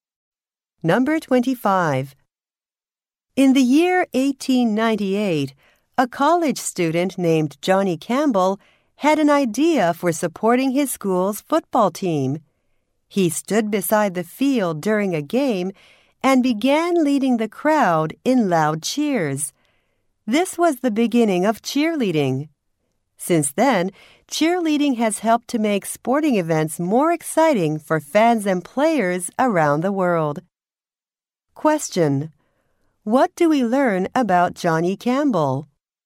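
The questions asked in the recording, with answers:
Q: What do we learn about Johnny Campbell?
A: He started cheerleading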